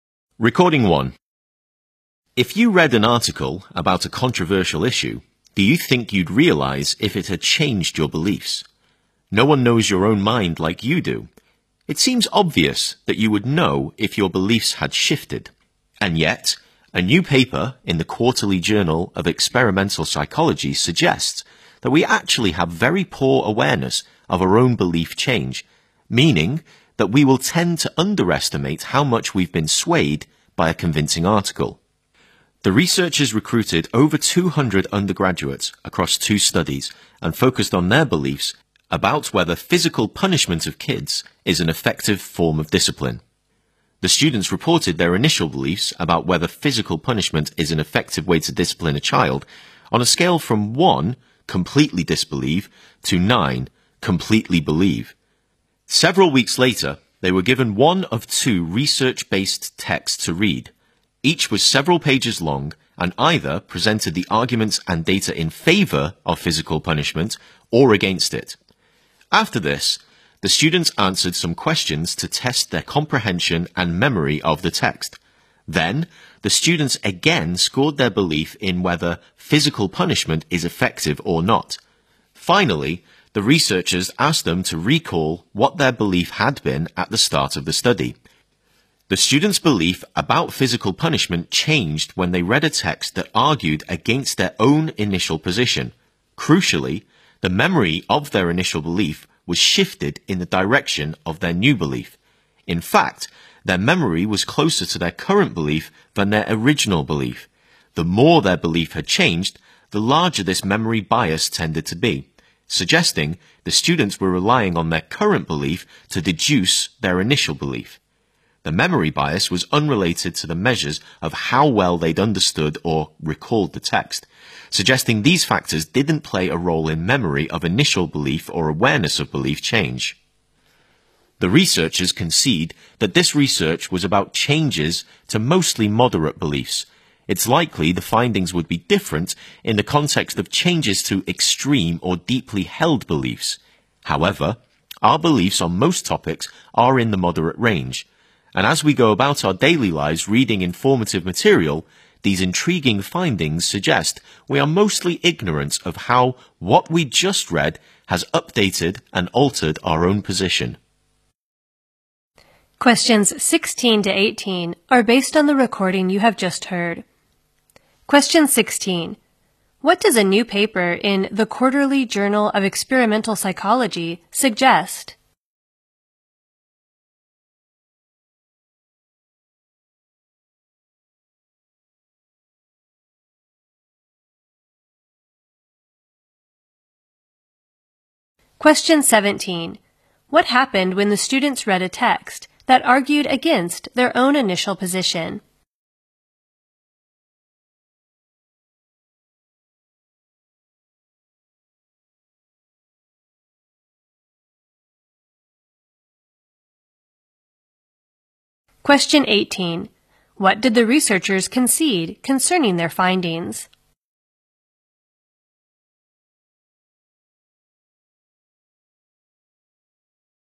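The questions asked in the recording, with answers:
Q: What does a new paper in the Quarterly Journal of Experimental Psychology suggest?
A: We have very poor awareness of our own belief change

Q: What happened when the students read a text that argued against their own initial position?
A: Their beliefs changed, and their memory of their initial belief shifted toward the new belief

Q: What did the researchers concede concerning their findings?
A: The research was about mostly moderate beliefs, and the results might be different for extreme or deeply held beliefs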